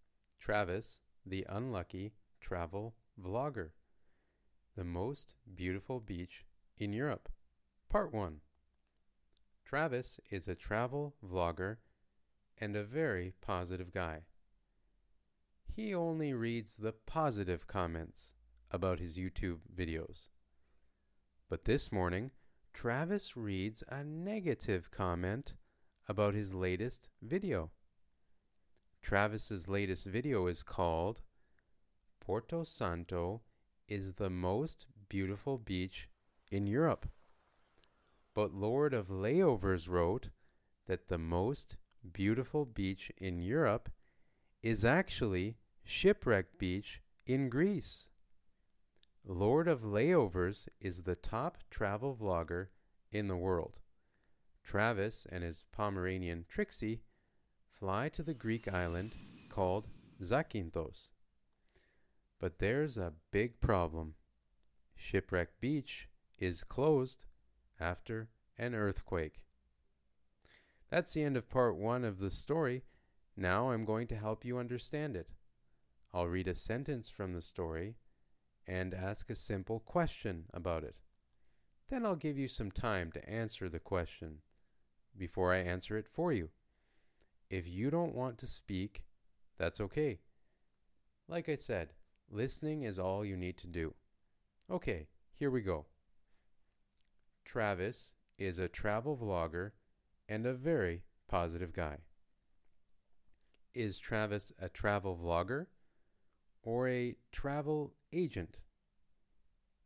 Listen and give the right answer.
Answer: Travis is a travel vlogger.